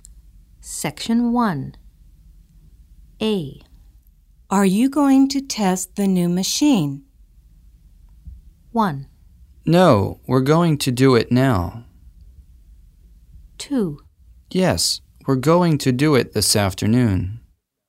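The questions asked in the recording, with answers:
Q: Are you going to test the new machine?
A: 2: Yes, we're going to do it this afternoon.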